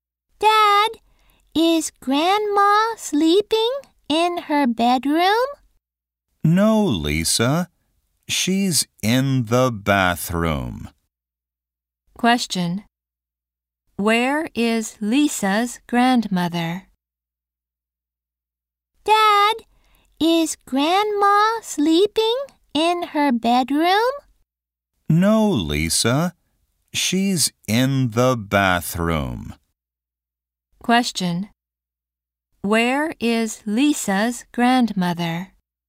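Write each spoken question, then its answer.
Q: Where is Lisa's grandmother?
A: In the bathroom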